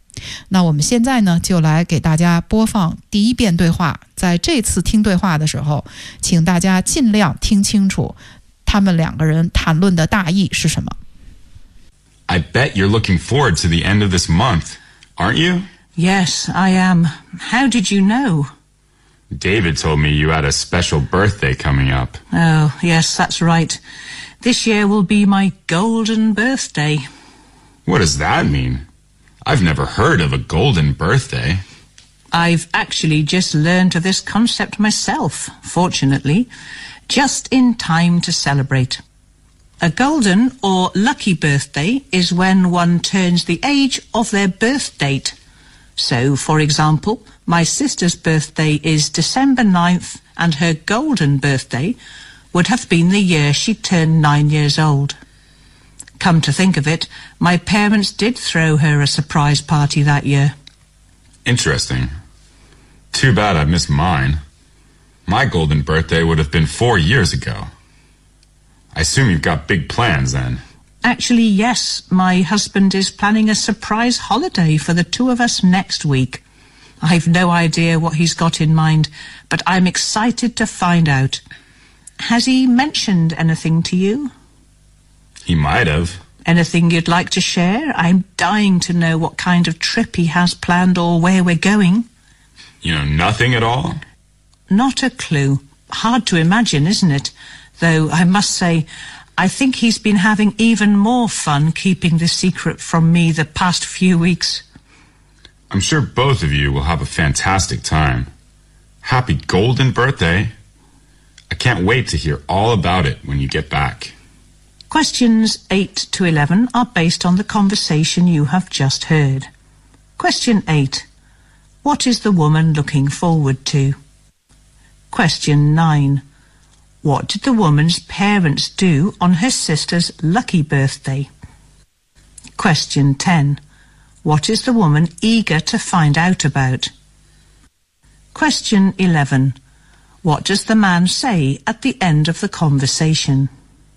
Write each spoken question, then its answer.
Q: What is the woman looking forward to?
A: The woman is looking forward to her coming birthday, which is a golden birthday.

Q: What did the woman's parents do on her sister's lucky birthday?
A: Well, they threw a surprise party to her sister on her sister's 9th birthday.

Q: What is the woman eager to find out about?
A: She is eager to find out the holiday plan her husband is keeping from her for her golden birthday.

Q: What does the man say at the end of the conversation?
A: I couldn't wait to hear all about it when you are back